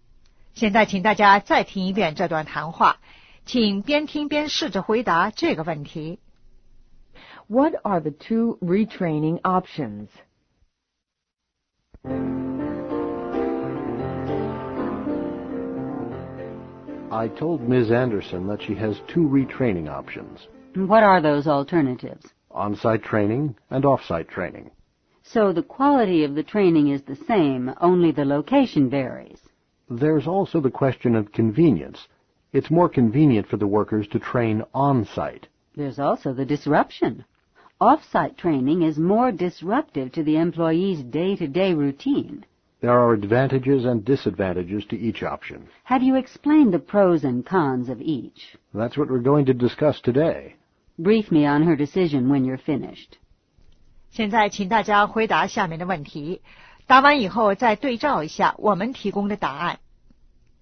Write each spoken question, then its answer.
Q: What are the two retraining options?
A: One, on-site training. Two, off-site training.